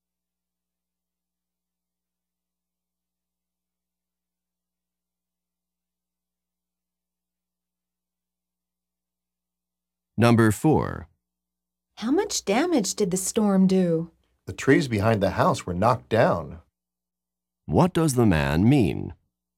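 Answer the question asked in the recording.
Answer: The storm knocked down the trees behind the house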